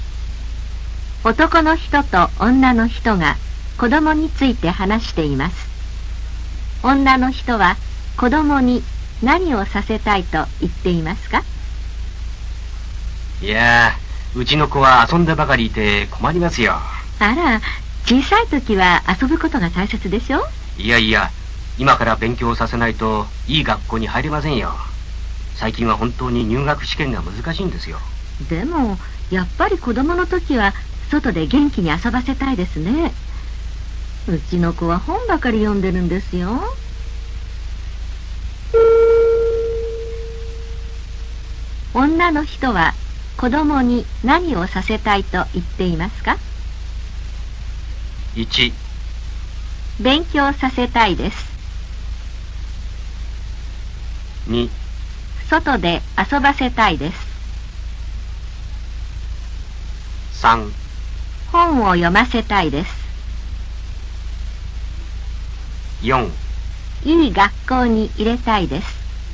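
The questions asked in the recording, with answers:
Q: 女の人は子供に何をさせたいと言っていますか?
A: 2: 外で遊ばせたいです。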